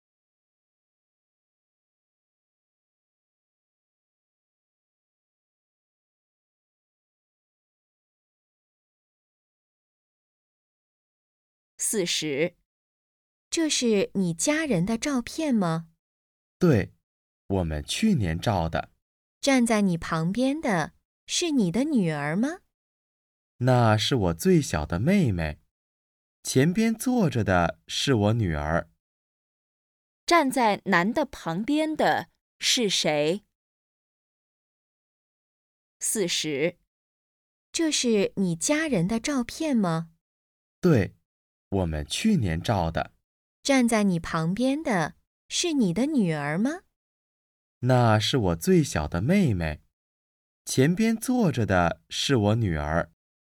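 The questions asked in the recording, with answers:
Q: 站在男的旁边的是谁?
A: 他最小的妹妹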